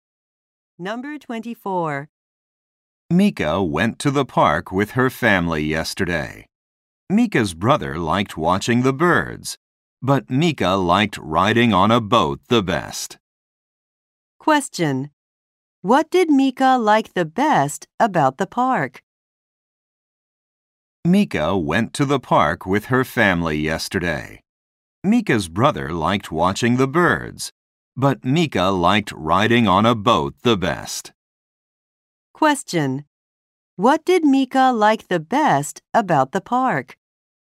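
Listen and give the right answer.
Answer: Riding on a boat.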